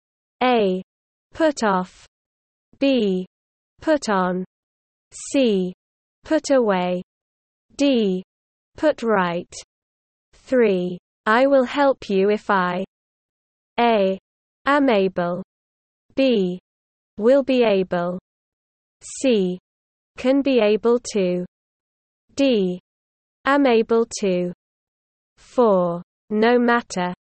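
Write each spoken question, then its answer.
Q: I will help you if I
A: A: am able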